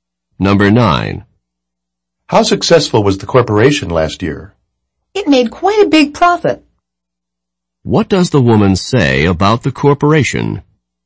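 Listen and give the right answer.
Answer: It made a big profit last year.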